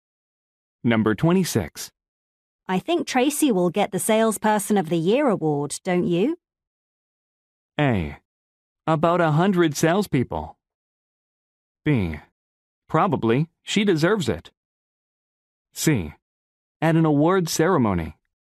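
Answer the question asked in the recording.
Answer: B: Probably, she deserves it.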